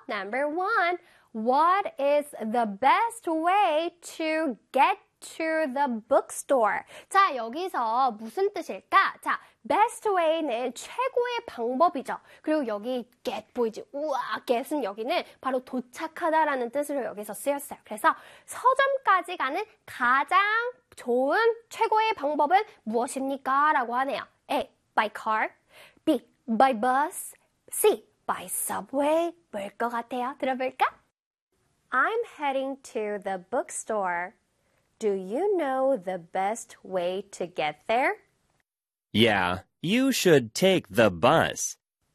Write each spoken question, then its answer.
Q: What is the best way to get to the bookstore?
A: By bus.